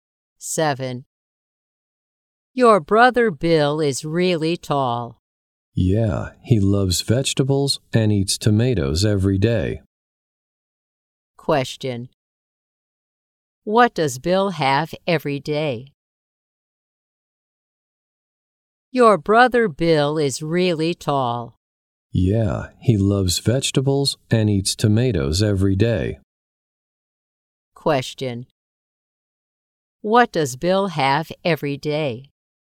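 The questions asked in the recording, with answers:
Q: What does Bill have every day?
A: Tomatoes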